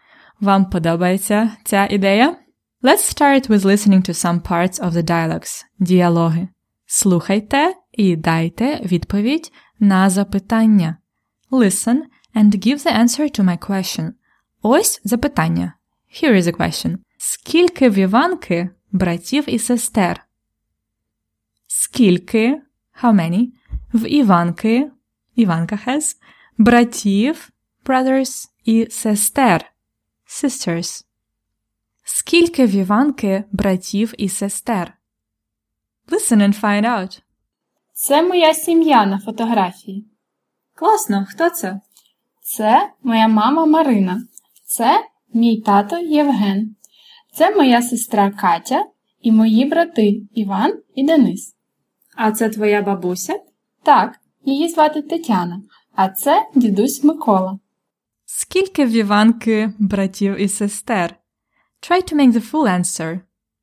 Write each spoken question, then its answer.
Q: Скільки в Іванки братів і сестер?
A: В Іванки два брати і одна сестра.